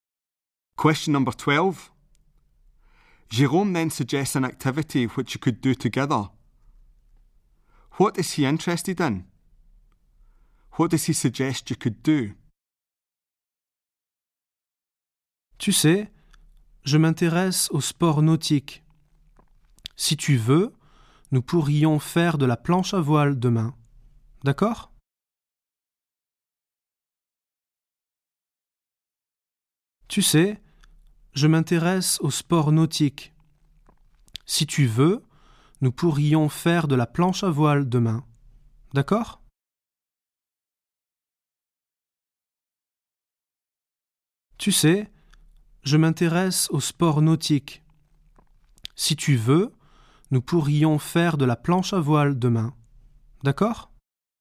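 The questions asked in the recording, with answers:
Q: What is he interested in?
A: Water sports

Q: What does he suggest you could do?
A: Go windsurfing tomorrow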